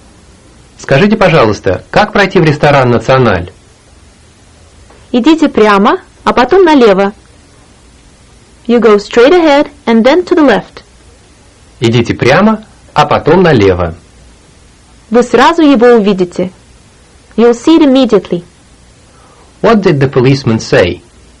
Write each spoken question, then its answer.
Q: What did the policeman say?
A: Идите прямо, а потом налево.